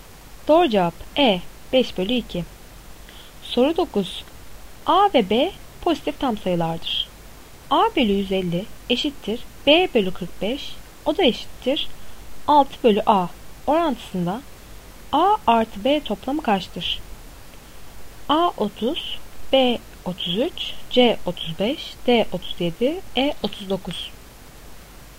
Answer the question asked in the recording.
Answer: Doğru cevap E 39.